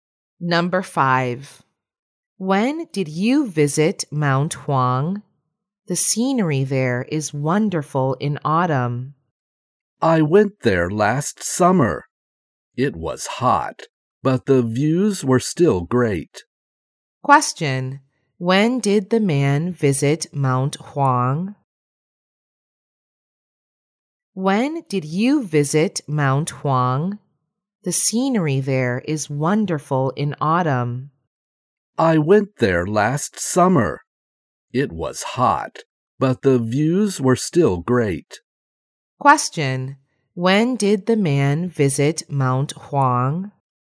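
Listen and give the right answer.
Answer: Last summer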